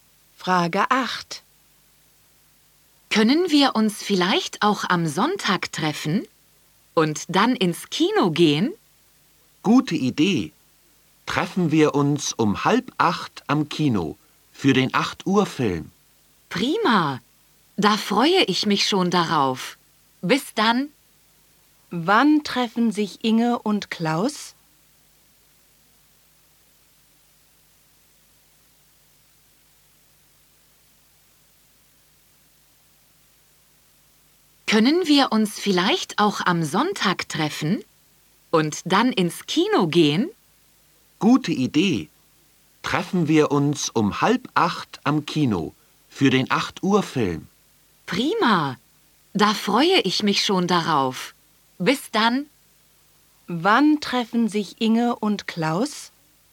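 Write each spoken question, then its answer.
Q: Wann treffen sich Inge und Klaus?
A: Am Sonntag um 7:30 am Kino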